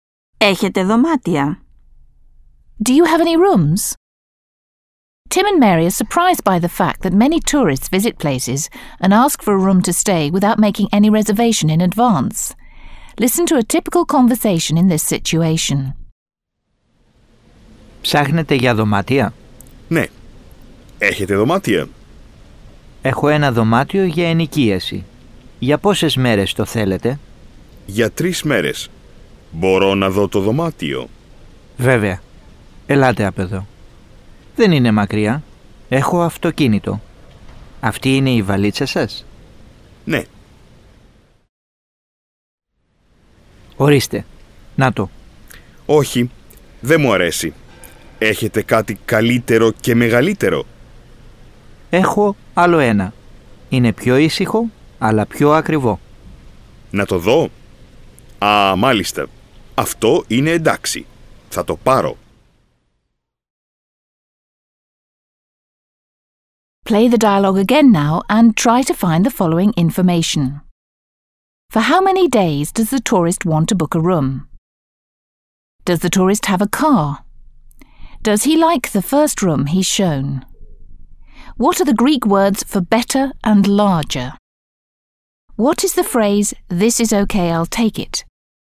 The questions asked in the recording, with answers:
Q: For how many days does the tourist want to book a room?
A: The tourist would like to book a room for 3 nights.

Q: Does the tourist have a car?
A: He doesn't have a car.

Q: What are the Greek words for better and larger?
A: The Greek words for better and larger are καλύτερο and μεγαλύτερο.

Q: What is the phrase, this is okay, I'll take it?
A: αυτό είναι εντάξει, θα το πάρω.